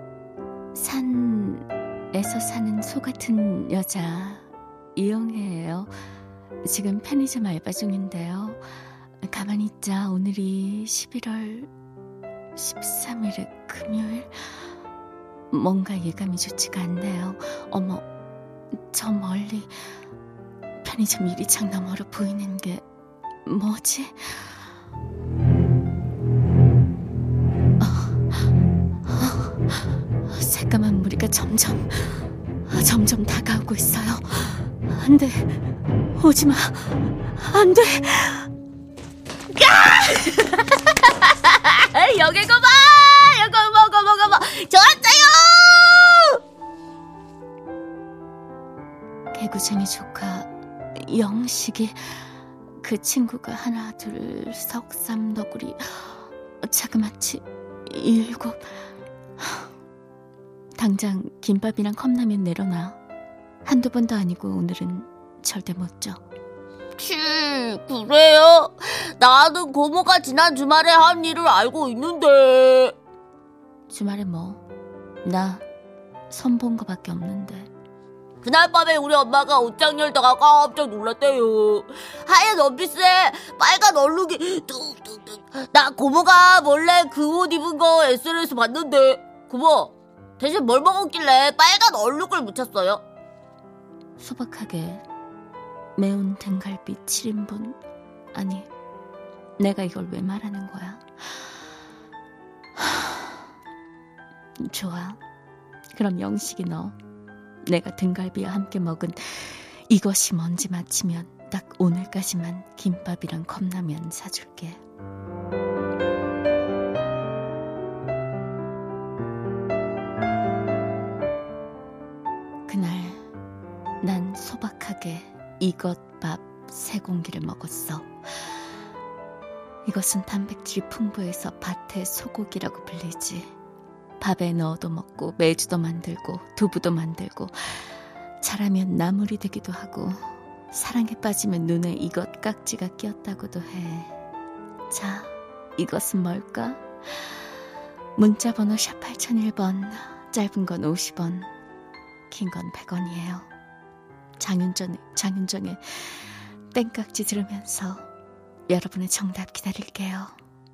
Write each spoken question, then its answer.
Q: 자, 이것은 뭘까?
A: 정답은 콩입니다.